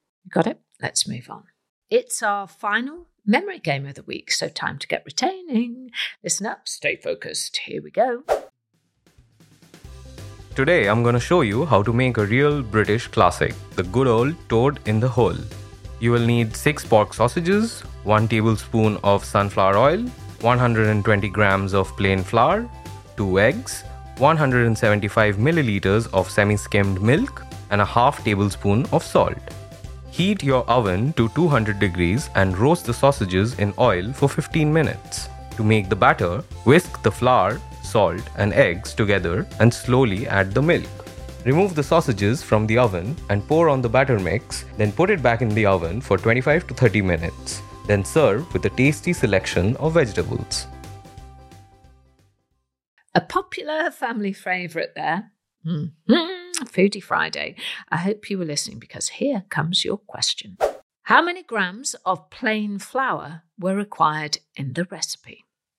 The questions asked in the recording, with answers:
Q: How many grams of plain flour were required in the recipe?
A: The answer was 120 grams.